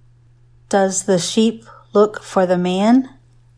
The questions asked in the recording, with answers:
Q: Does the sheep look for the man?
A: No, the man looks for the sheep.